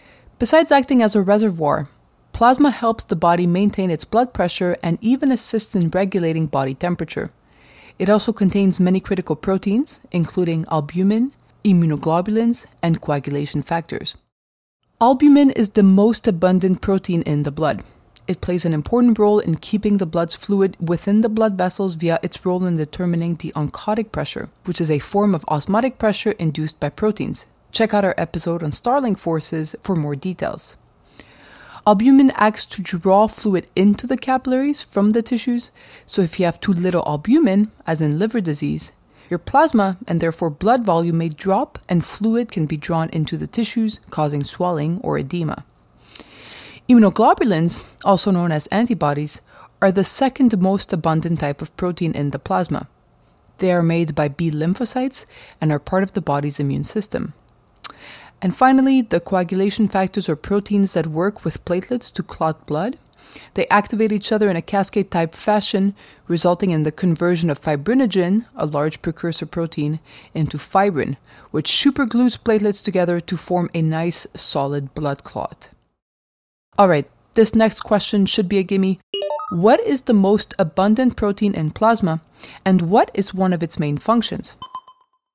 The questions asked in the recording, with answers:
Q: What is the most abundant protein in plasma, and what is one of its main functions?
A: The most abundant plasma protein is albumin, which helps maintain oncotic pressure and the proper amount of water in the plasma.